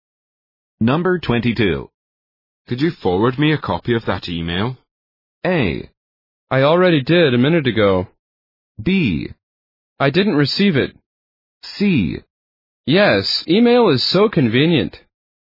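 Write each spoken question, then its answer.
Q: Could you forward me a copy of that email?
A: A: I already did a minute ago.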